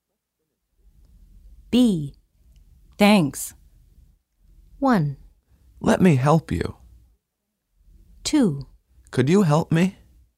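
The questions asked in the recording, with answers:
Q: Thanks.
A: 1: Let me help you.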